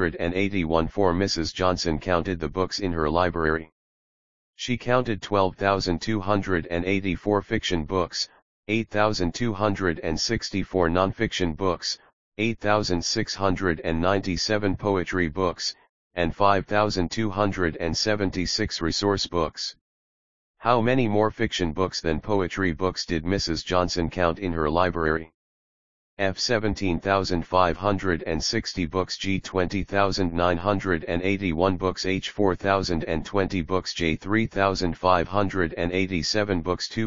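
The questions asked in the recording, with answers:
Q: How many more fiction books than poetry books did Mrs. Johnson count in her library?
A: J: 3,587 books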